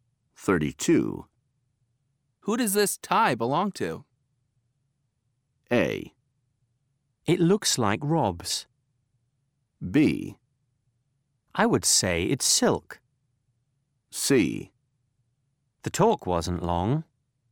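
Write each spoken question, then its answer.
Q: Who does this tie belong to?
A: A: It looks like Rob's.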